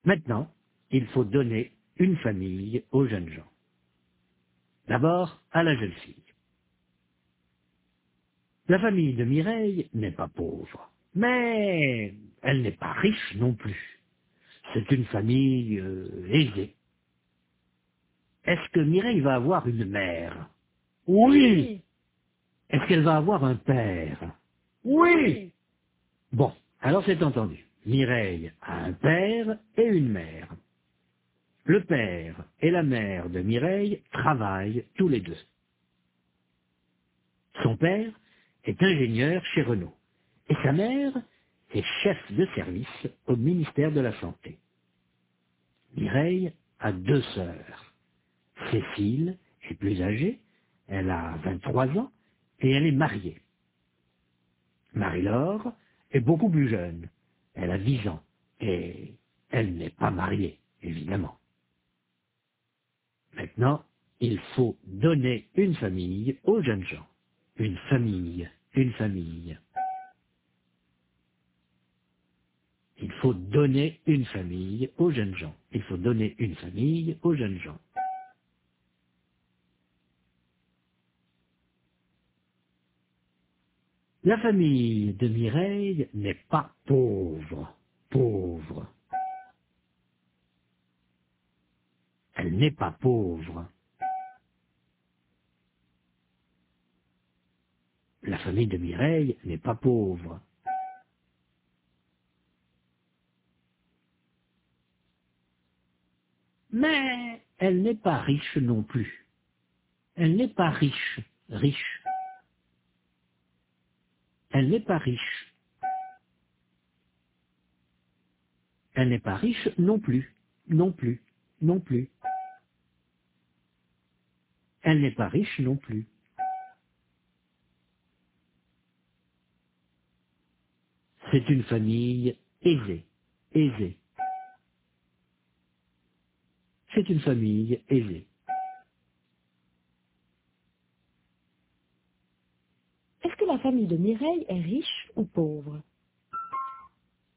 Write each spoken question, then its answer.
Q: Est-ce que la famille de Mireille est riche ou pauvre ?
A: La famille de Mireille n'est pas riche, mais elle n'est pas pauvre non plus.